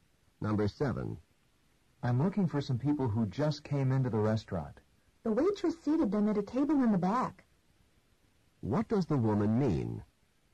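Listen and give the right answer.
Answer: The people are at a table in the back.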